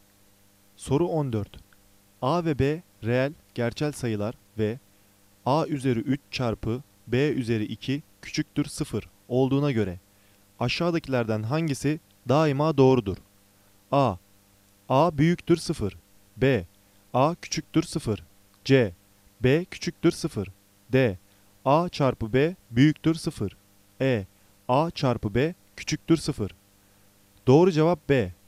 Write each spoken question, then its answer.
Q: A ve B reel, gerçel sayılar ve A üzeri 3 çarpı B üzeri 2 küçüktür 0 olduğuna göre aşağıdakilerden hangisi daima doğrudur?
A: Doğru cevap B.